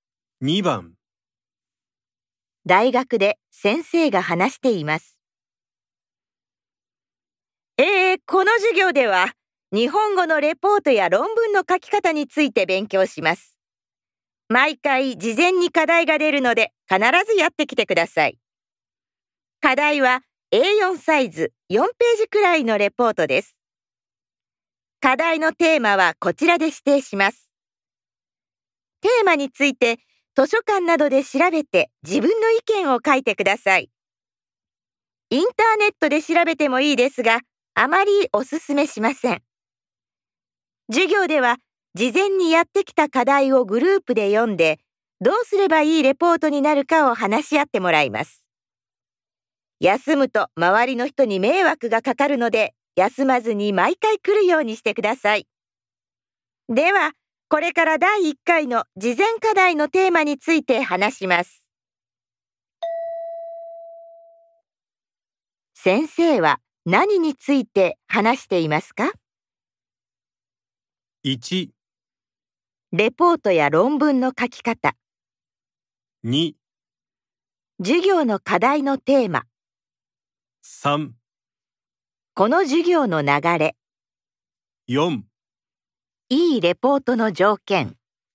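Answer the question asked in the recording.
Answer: 3: この授業の流れ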